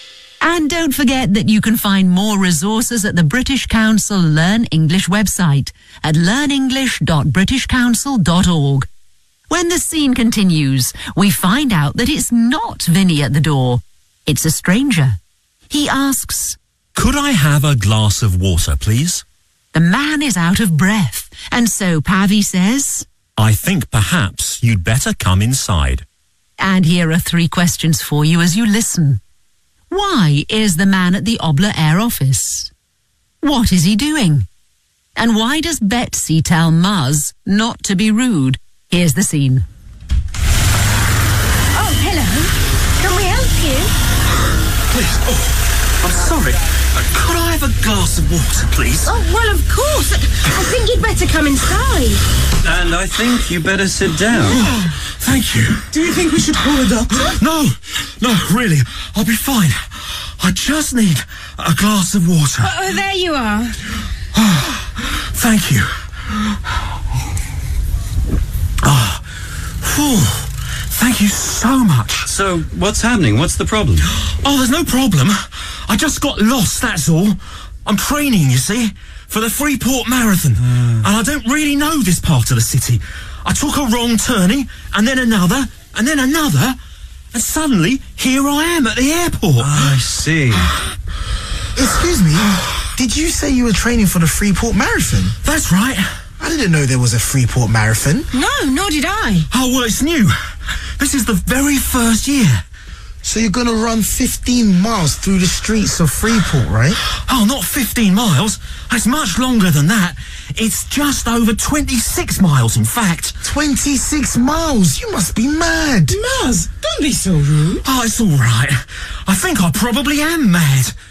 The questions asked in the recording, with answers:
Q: Why is the man at the Obla Air office?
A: I just got lost, that's all.

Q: What is he doing?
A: He's training for the Freeport Marathon.